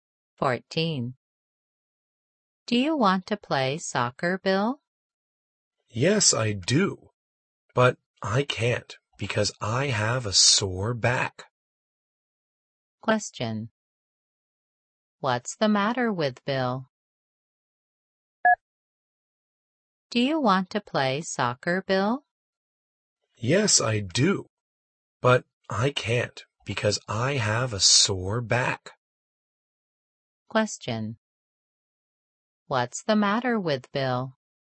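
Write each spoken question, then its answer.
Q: What's the matter with Bill?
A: He has a sore back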